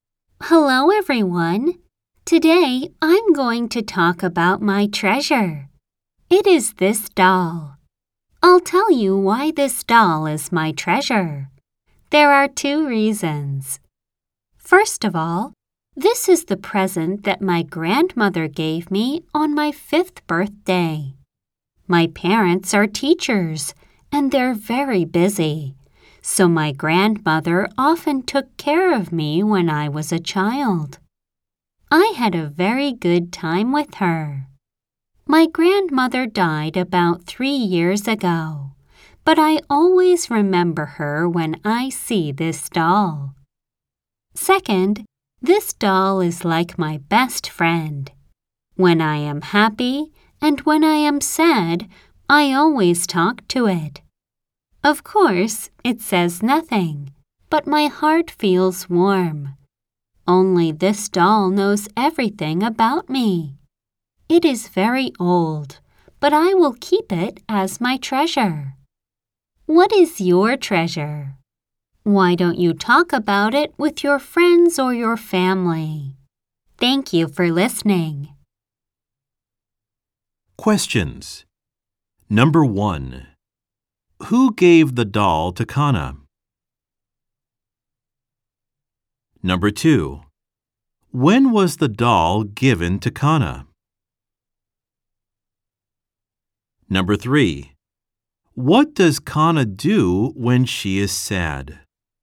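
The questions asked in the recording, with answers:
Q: Who gave the doll to Kana?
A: Her grandmother

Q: When was the doll given to Kana?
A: On her 5th birthday

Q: What does Kana do when she is sad?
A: She talks to the doll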